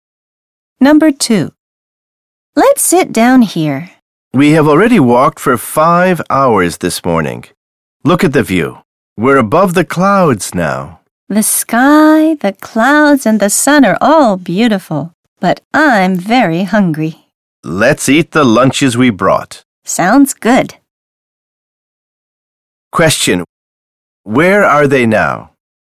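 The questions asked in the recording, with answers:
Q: Where are they now?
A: On a mountain, above the clouds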